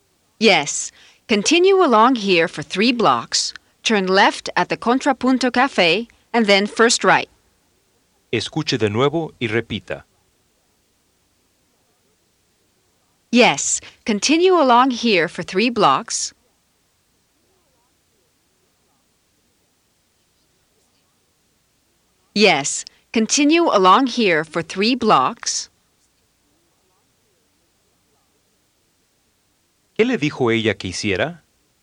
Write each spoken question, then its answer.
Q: ¿Qué le dijo ella que hiciera?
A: Continue along here for 3 blocks.